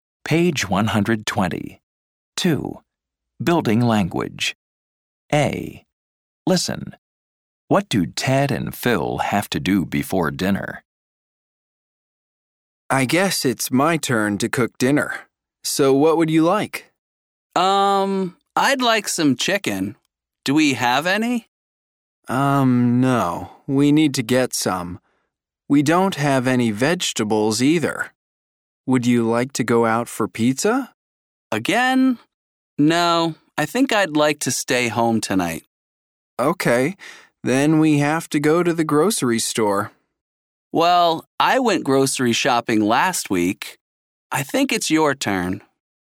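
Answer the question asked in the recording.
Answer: Go to the grocery store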